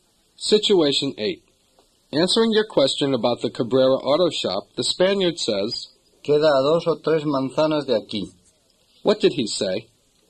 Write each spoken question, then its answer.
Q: What did he say?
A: He said, It's two or three blocks from here.